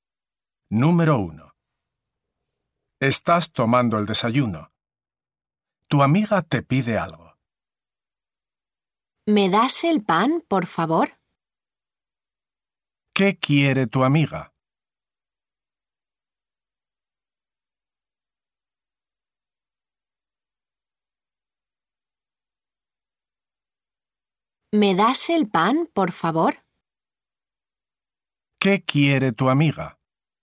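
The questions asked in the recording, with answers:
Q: ¿Qué quiere tu amiga?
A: el pan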